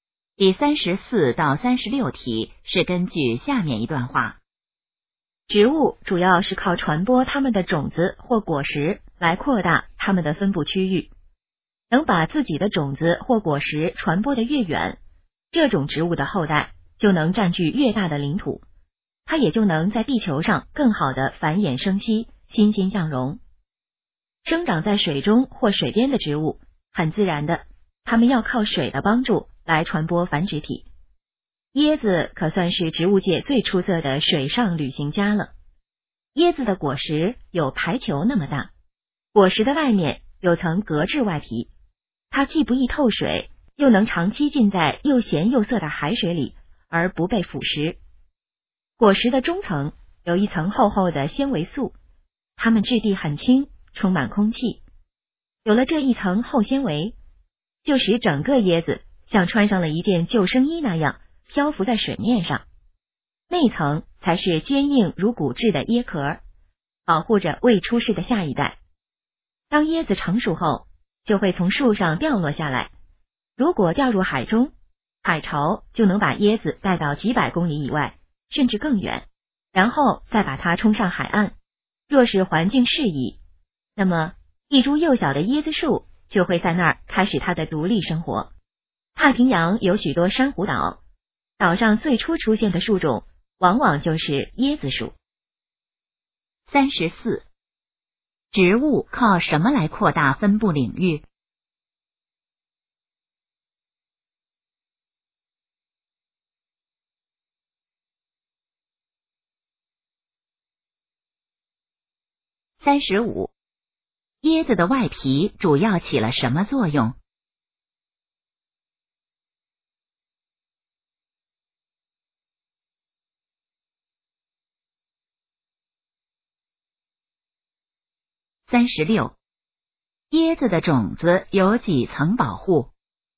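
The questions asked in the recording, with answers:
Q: 植物靠什么来扩大分布领域?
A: 传播种子或果实

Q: 椰子的外皮主要起了什么作用?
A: 不易透水,耐海水腐蚀

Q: 椰子的种子有几层保护?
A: 三层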